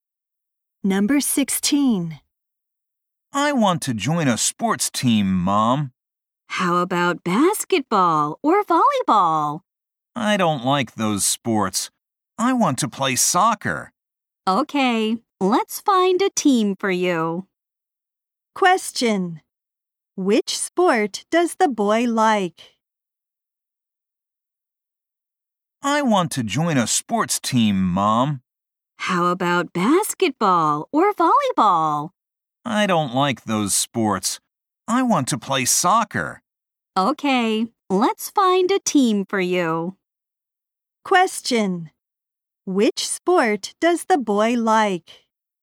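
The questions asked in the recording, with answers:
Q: Which sport does the boy like?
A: Soccer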